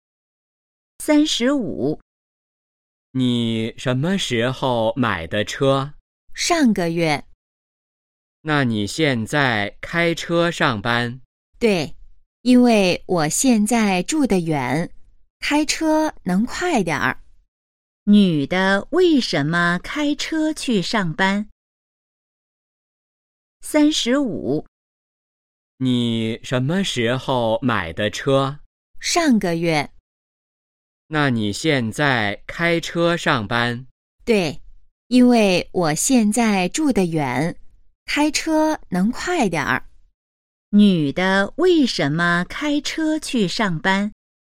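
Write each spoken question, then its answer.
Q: 女的为什么开车去上班?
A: 因为她现在住得远,开车能快点儿。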